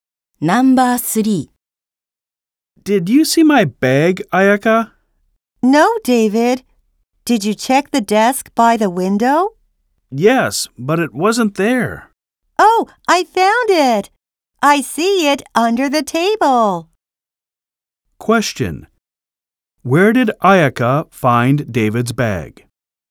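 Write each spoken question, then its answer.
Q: Where did Ayaka find David's bag?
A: Under the table.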